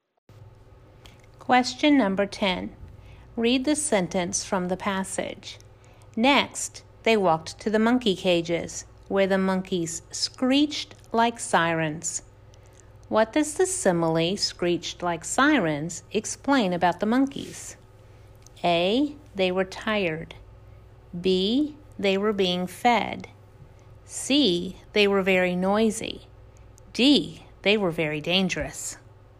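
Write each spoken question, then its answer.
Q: What does the simile "screeched like sirens" explain about the monkeys?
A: C: They were very noisy.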